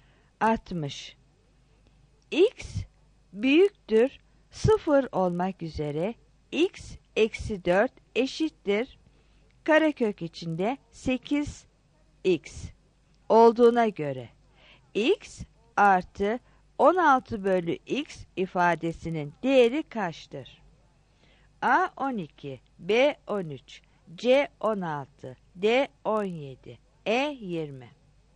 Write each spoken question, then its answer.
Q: X büyüktür 0 olmak üzere X eksi 4 eşittir karekök içinde 8x olduğuna göre x artı 16 bölü x ifadesinin değeri kaçtır?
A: 60 C